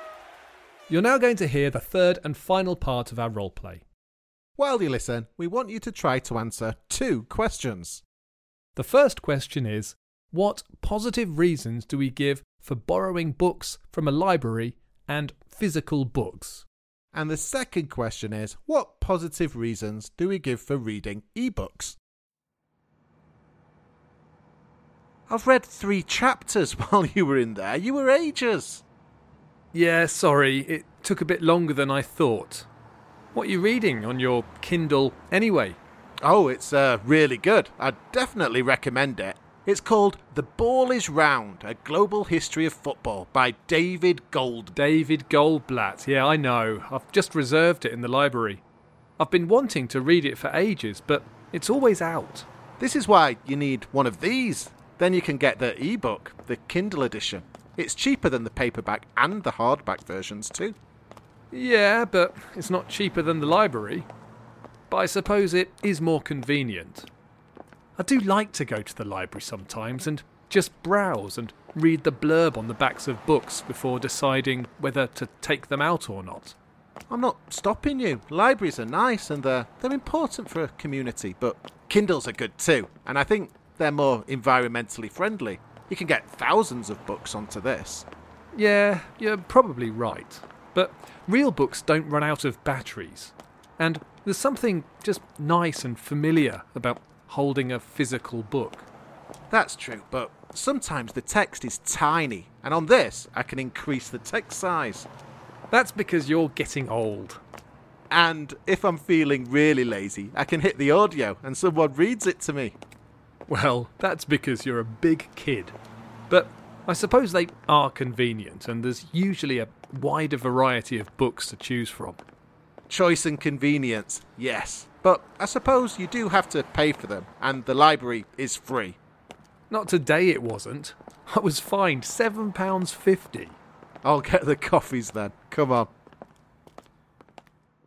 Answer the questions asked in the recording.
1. Well, the first positive thing that we said was that borrowing books is free.
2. Yeah, I said two of the positive reasons were choice and convenience.